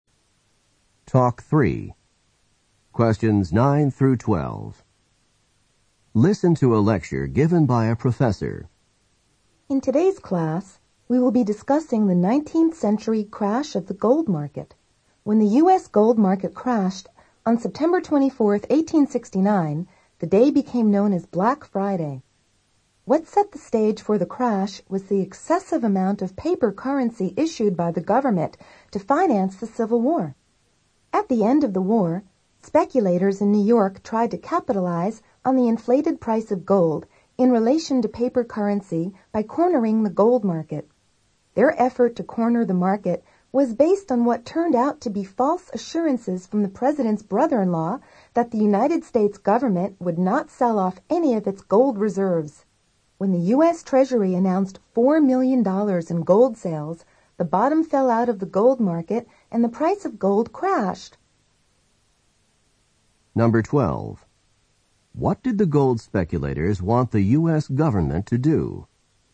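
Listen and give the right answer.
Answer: Not sell off any of its gold reserves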